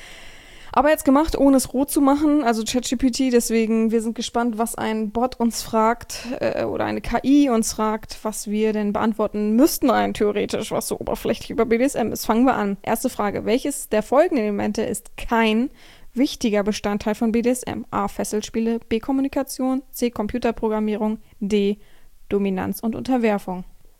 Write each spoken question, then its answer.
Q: welches der folgenden Elemente ist kein wichtiger Bestandteil von BDSM?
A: Antwort Nummer 1, C, Computerprogrammierung, ist richtig.